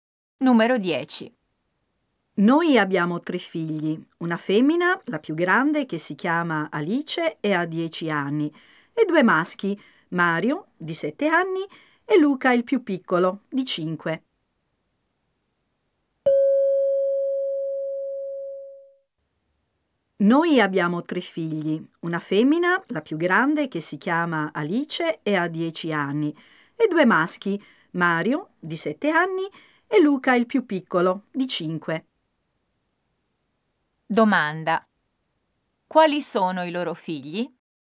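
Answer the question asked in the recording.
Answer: Una femmina (Alice, 10 anni) e due maschi (Mario, 7 anni, e Luca, 5 anni)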